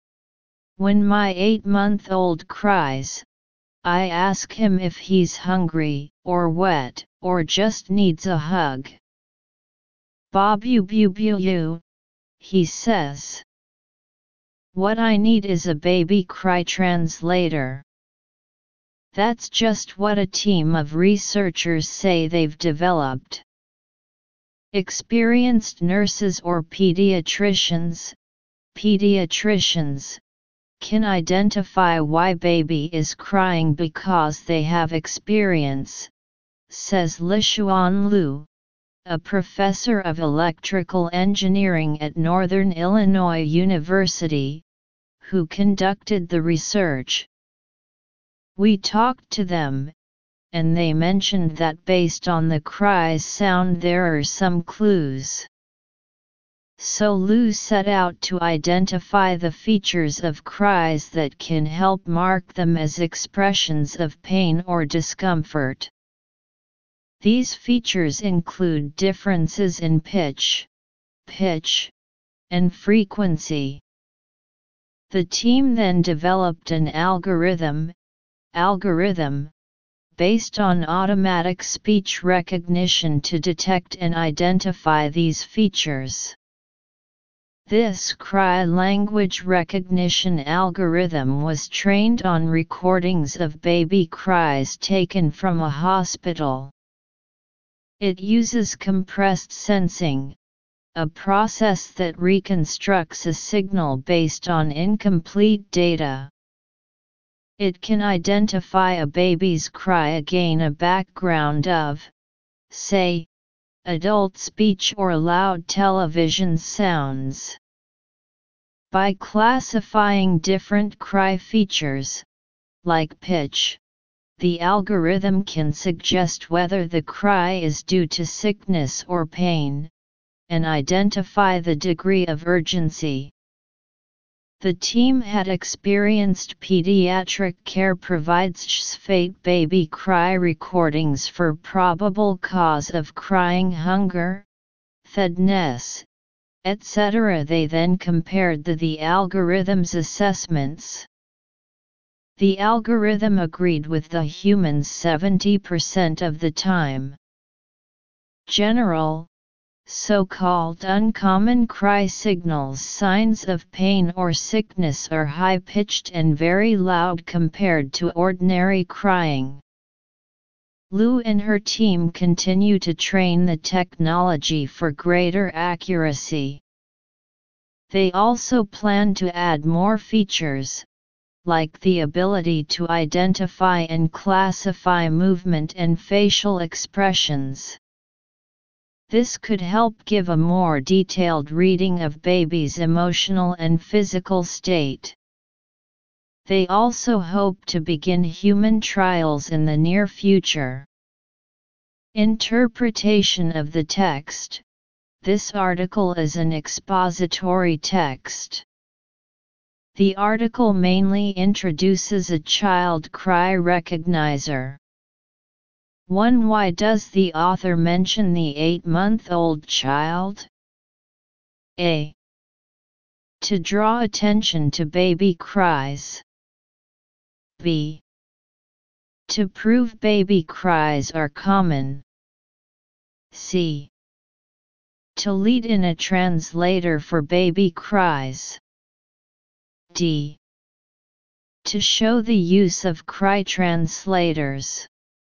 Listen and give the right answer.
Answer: Analysis. Choose C.